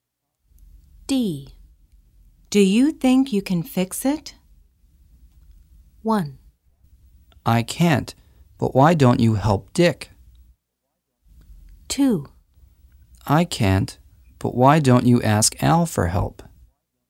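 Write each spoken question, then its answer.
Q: Do you think you can fix it?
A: 2: I can't, but why don't you ask Al for help?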